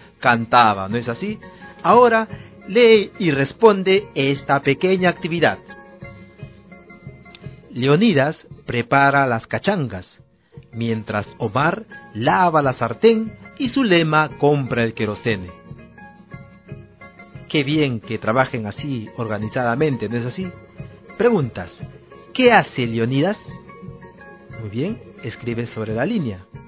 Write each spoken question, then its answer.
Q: ¿Qué hace Leonidas?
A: Prepara las cachangas, ¿no es así?